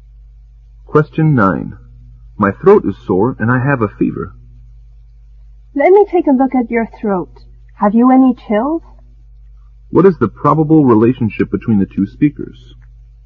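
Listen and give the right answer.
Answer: Doctor and patient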